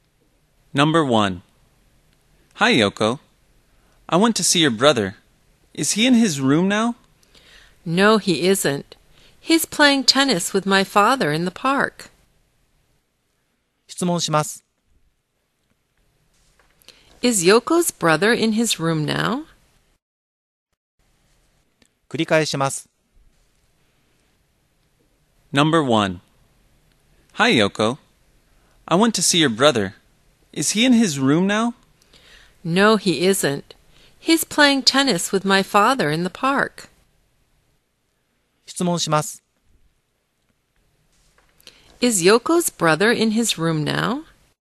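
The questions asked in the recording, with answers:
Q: Is Yoko's brother in his room now?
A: No, he isn't. He's playing tennis in the park.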